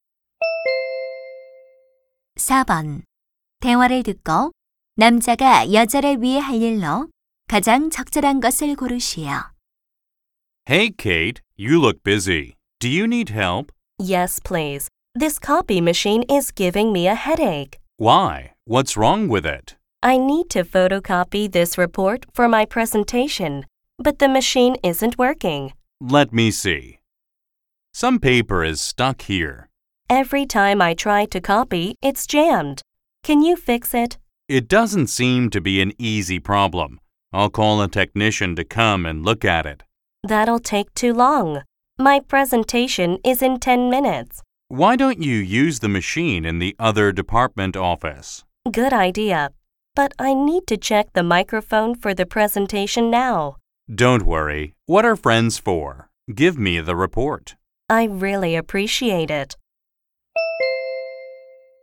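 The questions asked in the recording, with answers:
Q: 대화를 듣고 남자가 여자를 위해 할 일로 가장 적절한 것을 고르시오.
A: 다른 부서 사무실에서 보고서 복사하기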